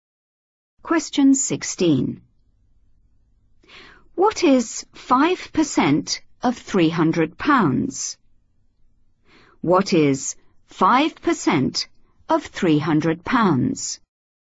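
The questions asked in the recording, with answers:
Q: What is 5% of £300?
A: £15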